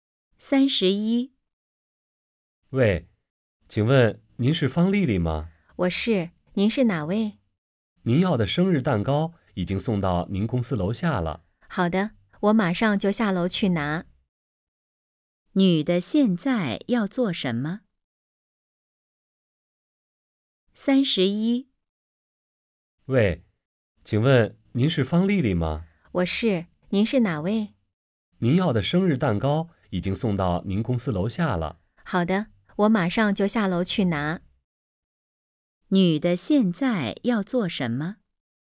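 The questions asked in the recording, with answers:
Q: 女的现在要做什么?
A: 下楼去拿蛋糕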